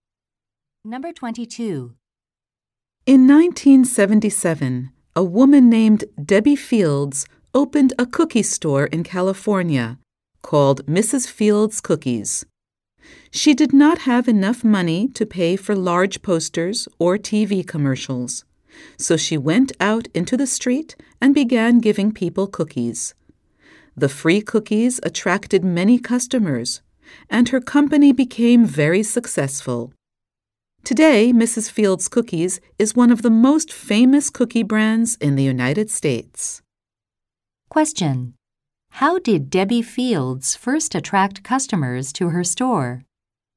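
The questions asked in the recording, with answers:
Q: How did Debbie Fields first attract customers to her store?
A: By giving people free cookies in the street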